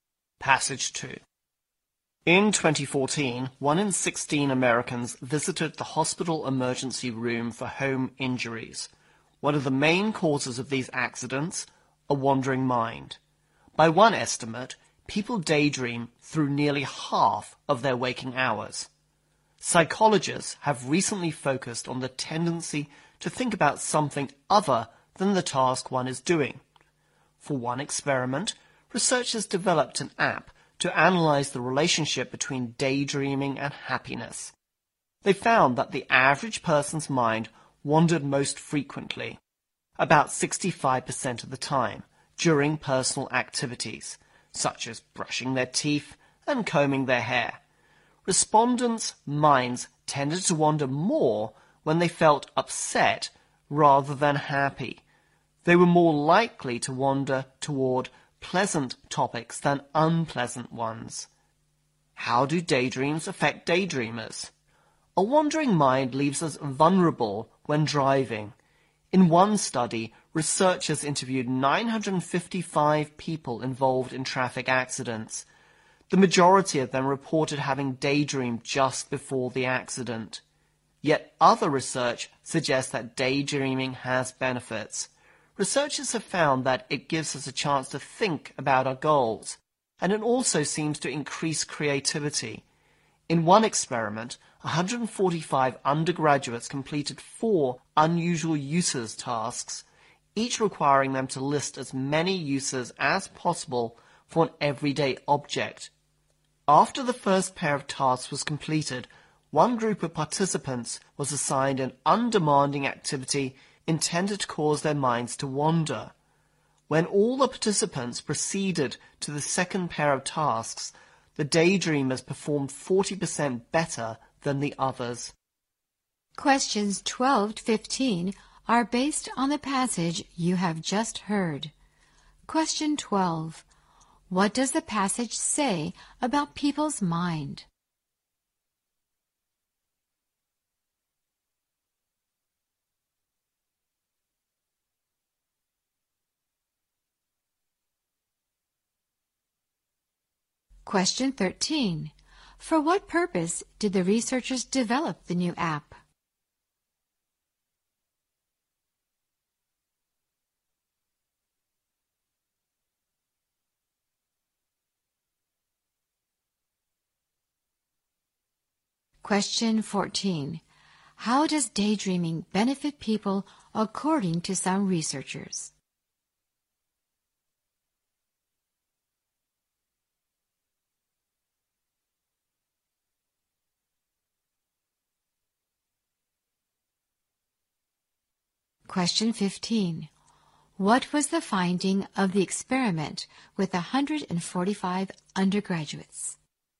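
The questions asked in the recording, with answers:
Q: What does the passage say about people's mind?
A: People daydream through nearly half of their waking hours

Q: For what purpose did the researchers develop the new app?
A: To analyze the relationship between daydreaming and happiness

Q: How does daydreaming benefit people according to some researchers?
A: It lets us think about our goals and increases creativity

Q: What was the finding of the experiment with 145 undergraduates?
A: The daydreamers performed 40% better on the second tasks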